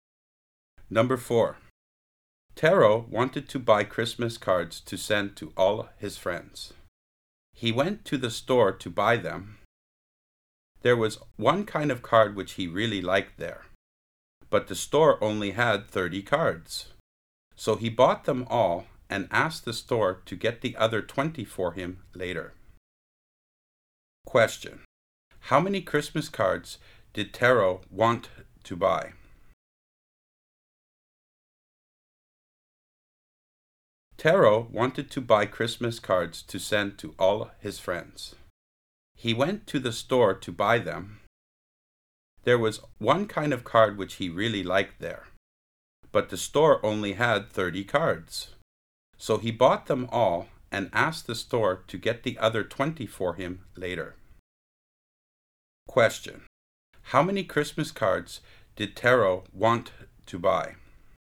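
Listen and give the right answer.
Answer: 50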